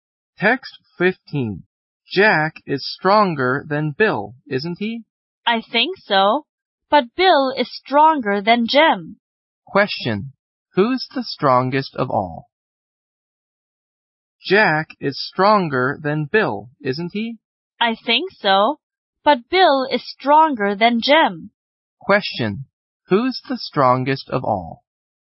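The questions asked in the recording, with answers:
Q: Who's the strongest of all?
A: Jack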